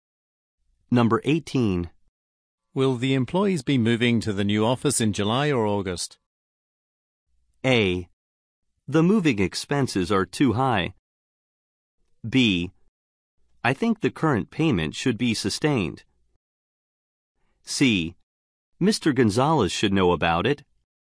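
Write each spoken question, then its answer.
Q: Will the employees be moving to the new office in July or August?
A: C: Mr. Gonzalez should know about it.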